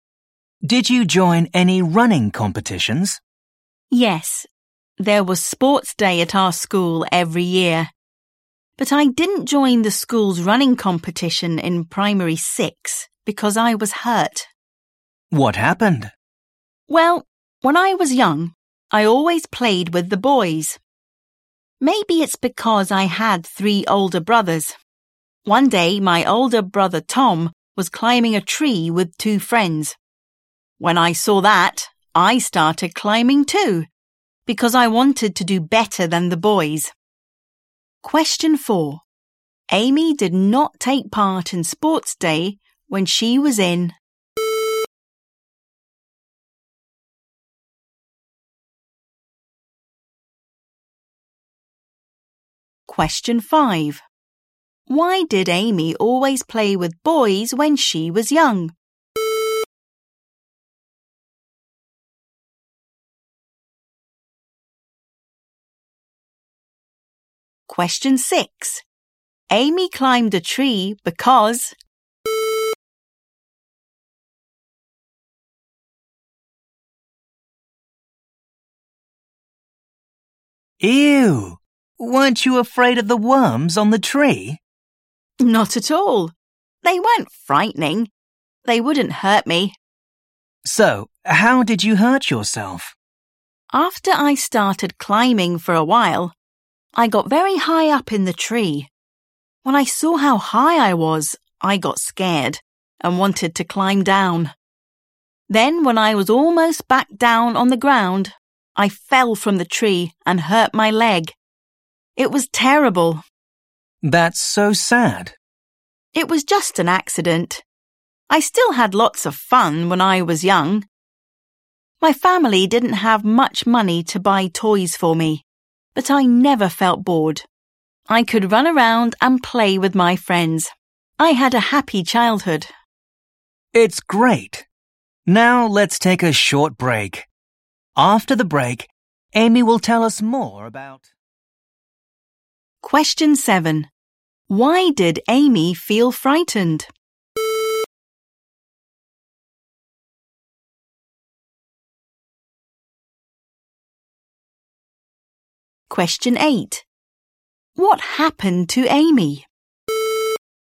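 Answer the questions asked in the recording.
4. Primary 6
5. Because she had 3 older brothers
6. she wanted to do better than the boys
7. She saw how high up in the tree she was
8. She fell from the tree and hurt her leg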